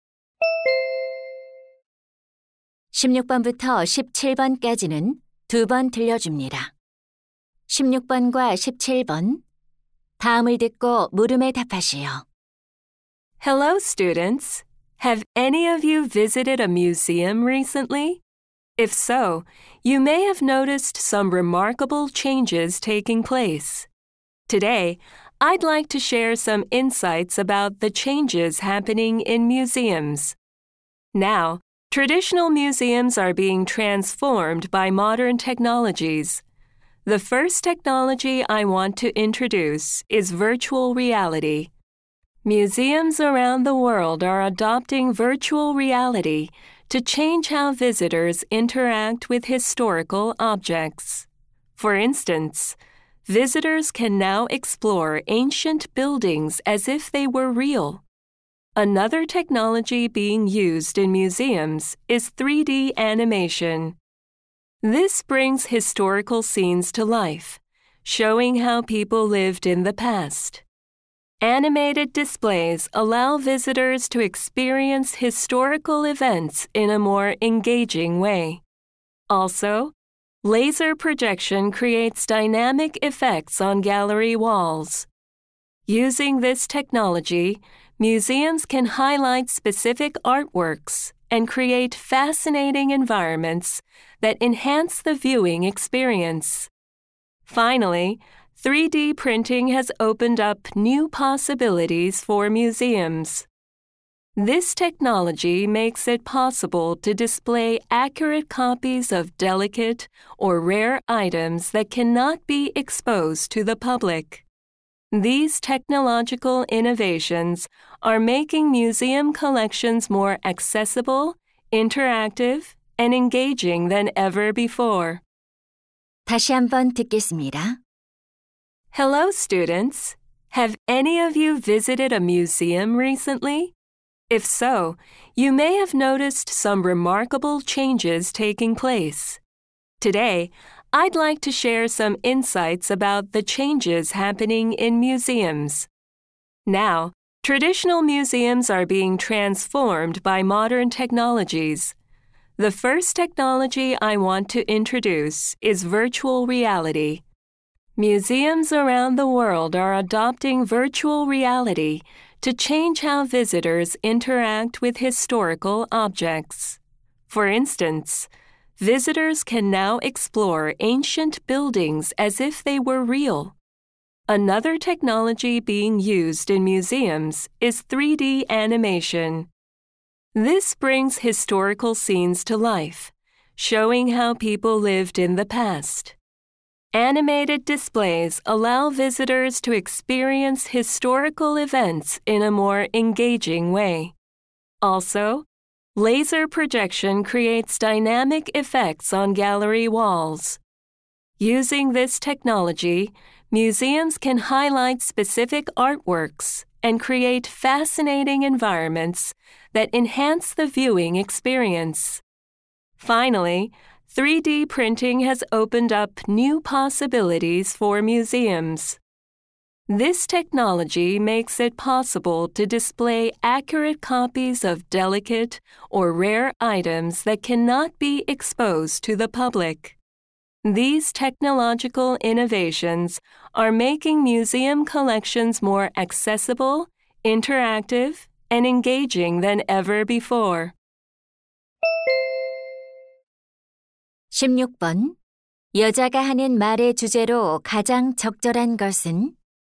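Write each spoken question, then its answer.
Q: 여자가 하는 말의 주제로 가장 적절한 것은?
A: 현대 기술이 박물관을 변화시키는 방식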